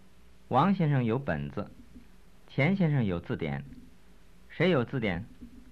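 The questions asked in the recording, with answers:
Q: 谁有字典?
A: 钱先生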